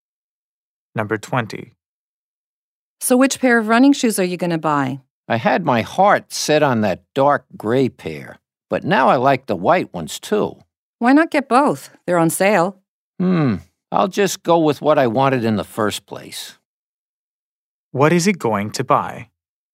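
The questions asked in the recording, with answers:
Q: What is he going to buy?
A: The dark gray running shoes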